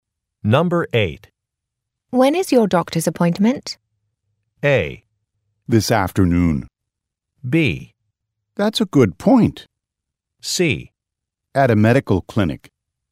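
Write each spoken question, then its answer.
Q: When is your doctor's appointment?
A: A: This afternoon.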